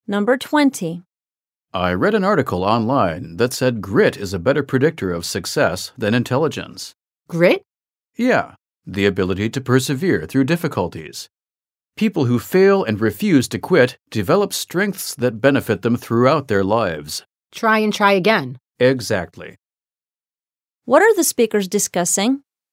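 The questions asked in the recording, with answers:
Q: What are the speakers discussing?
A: An article saying grit (perseverance) predicts success better than intelligence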